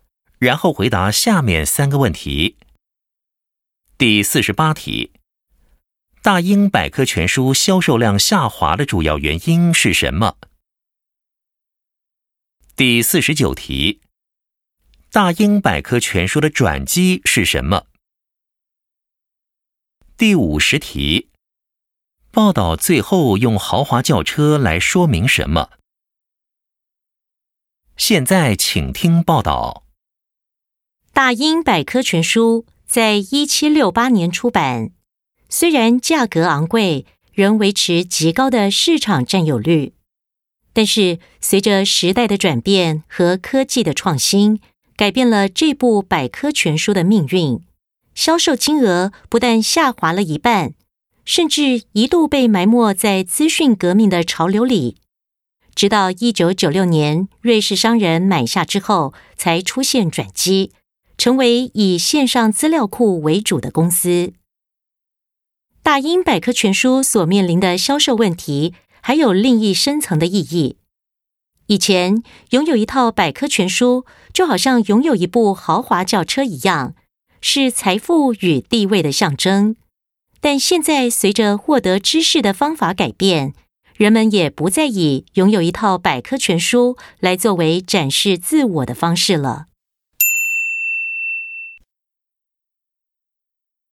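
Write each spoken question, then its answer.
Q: 大英百科全书销售量下滑的主要原因是什么?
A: 时代转变和科技创新(资讯革命)

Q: 大英百科全书的转机是什么?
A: 1996年瑞士商人买下后转型为以线上资料库为主的公司

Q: 报道最后用豪华轿车来说明什么?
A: 拥有百科全书曾是财富与地位的象征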